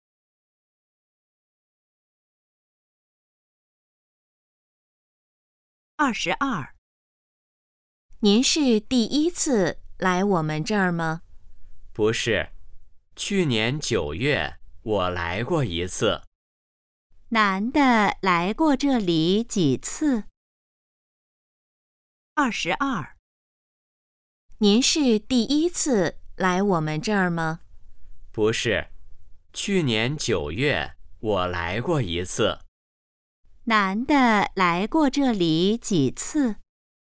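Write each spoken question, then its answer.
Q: 男的来过这里几次?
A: 一次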